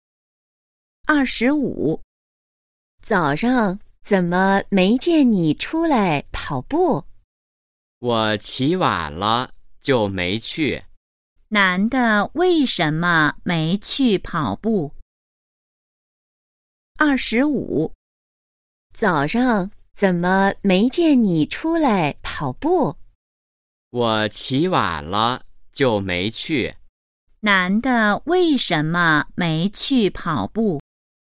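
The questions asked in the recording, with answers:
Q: 男的为什么没去跑步?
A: 他起晚了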